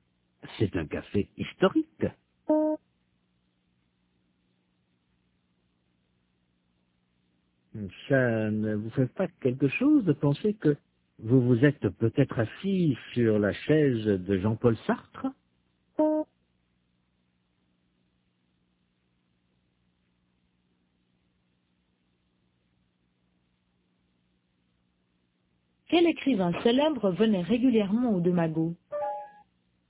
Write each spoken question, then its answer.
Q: Quel écrivain célèbre venait régulièrement aux deux magots?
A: Jean-Paul Sartre.